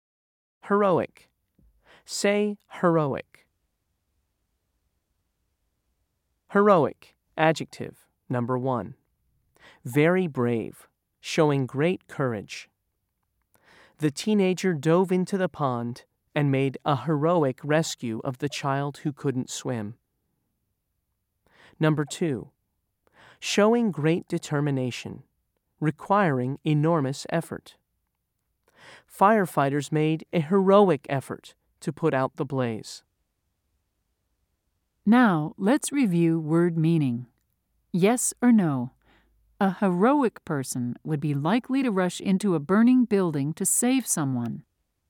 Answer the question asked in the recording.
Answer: If you said yes, you are right.